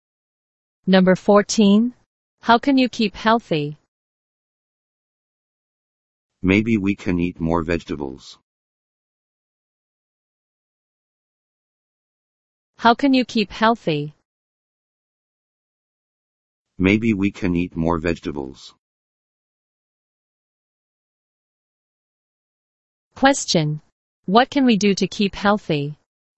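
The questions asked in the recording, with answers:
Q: Question. What can we do to keep healthy?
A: Eat more vegetables.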